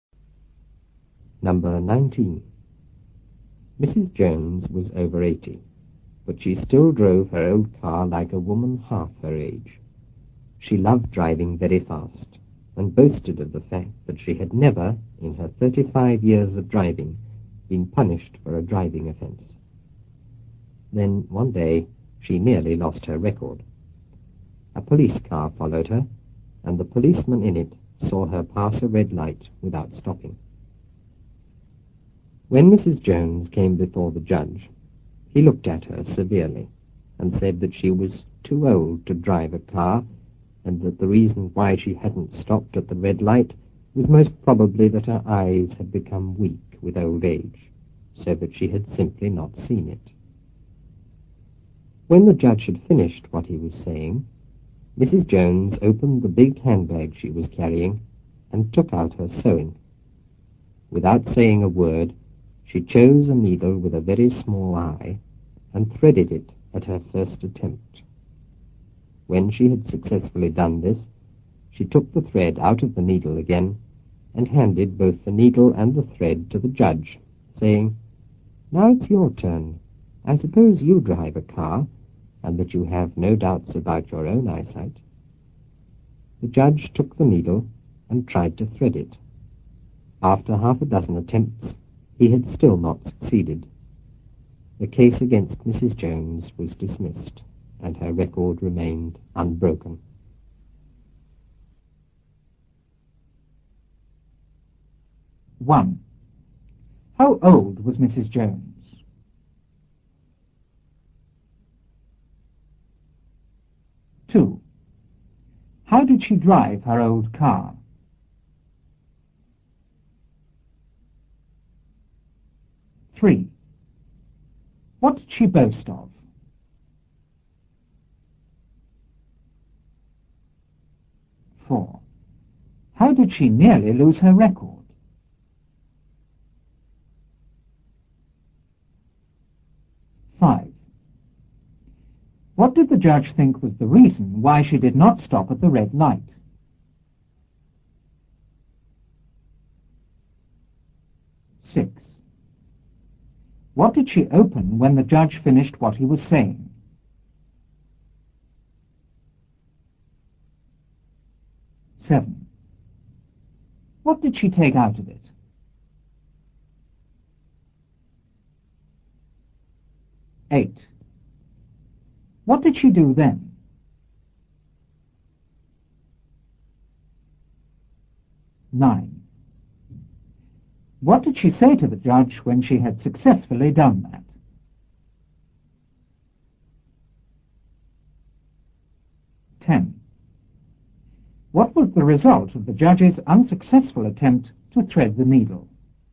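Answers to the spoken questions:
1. Over 80
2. Very fast, like a woman half her age
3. That she had never been punished for a driving offence in 35 years of driving
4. A policeman saw her pass a red light without stopping
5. Her eyes had become weak with old age, so she had not seen it
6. Her big handbag
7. Her sewing
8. She threaded a needle with a very small eye at her first attempt
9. "Now it's your turn. I suppose you drive a car, and that you have no doubts about your own eyesight."
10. The case against her was dismissed and her record remained unbroken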